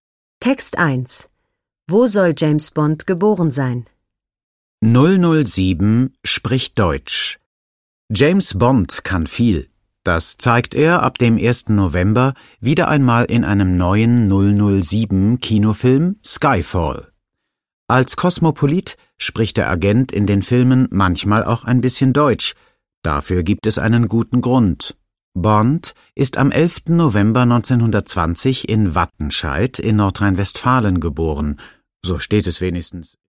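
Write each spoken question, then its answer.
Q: Wo soll James Bond geboren sein?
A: In Wattenscheid in Nordrhein-Westfalen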